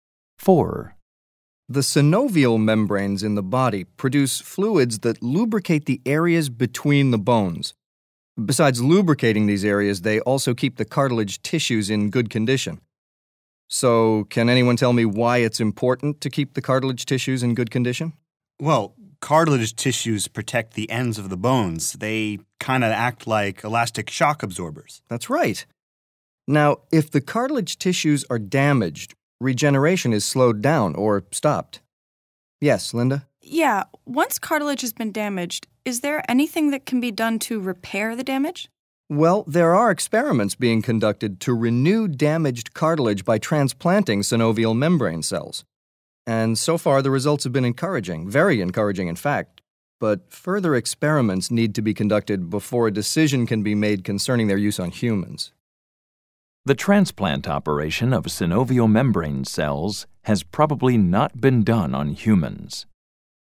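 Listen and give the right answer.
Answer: True (can be inferred)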